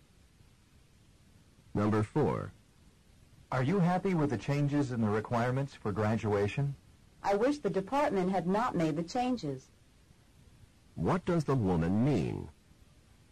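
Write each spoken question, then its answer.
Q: What does the woman mean?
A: She is not happy the department made the changes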